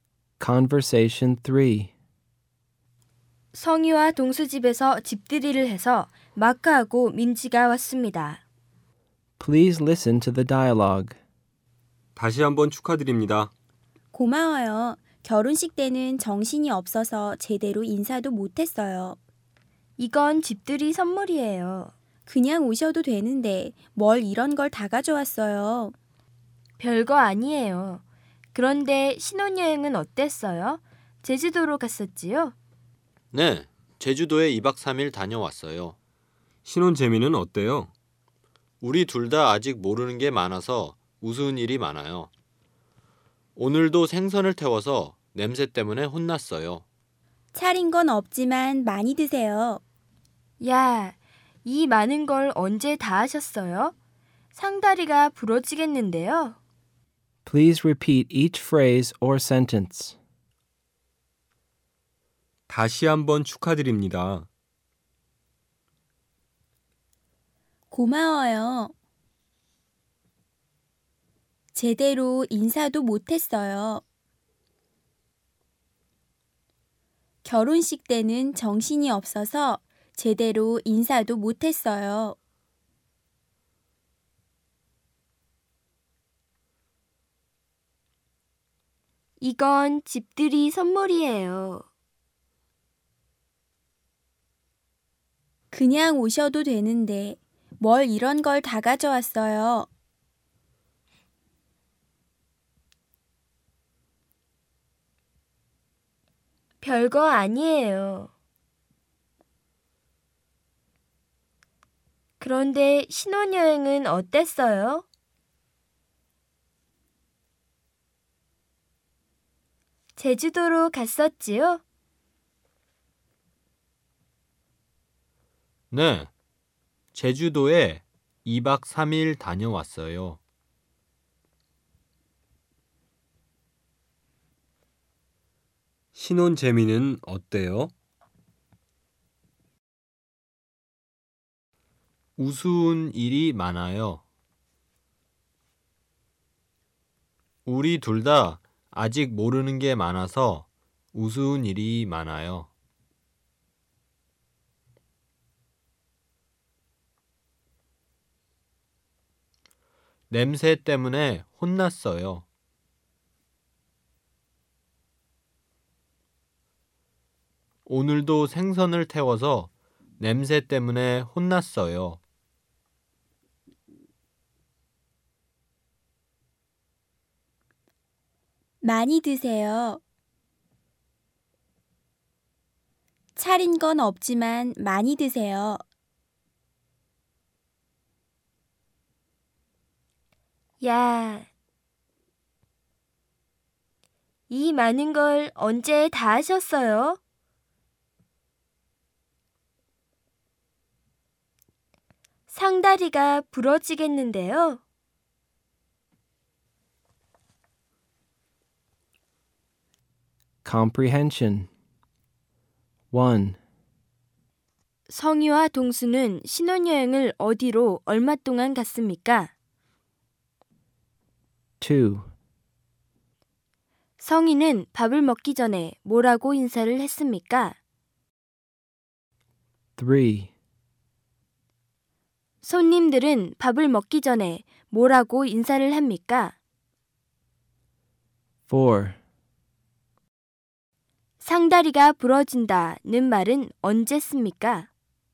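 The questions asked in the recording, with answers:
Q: 성희와 동수는 신혼여행을 어디로 얼마 동안 갔습니까?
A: 제주도에 2박 3일 갔습니다.

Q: 성희는 밥을 먹기 전에 뭐라고 인사를 했습니까?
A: 차린 건 없지만 많이 드세요.

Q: 상다리가 부러진다는 말은 언제 씁니까?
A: 상에 음식을 아주 많이 차렸을 때 씁니다.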